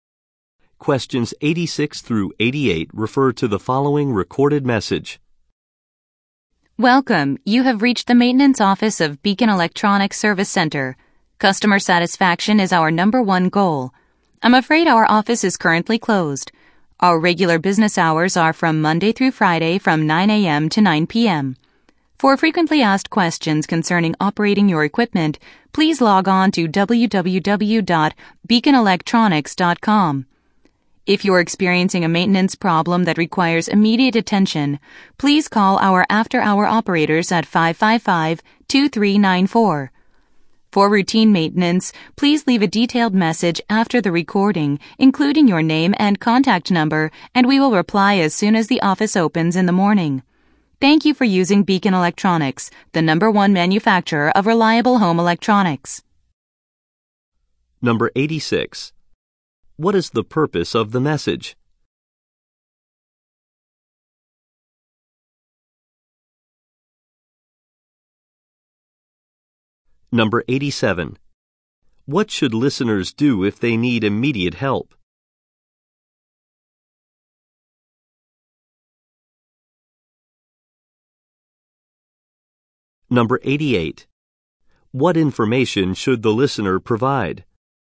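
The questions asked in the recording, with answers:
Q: What is the purpose of the message?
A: To say the office is closed and give contact options

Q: What should listeners do if they need immediate help?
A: Call the after-hour operators at 555-2394

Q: What information should the listener provide?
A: Their name and contact number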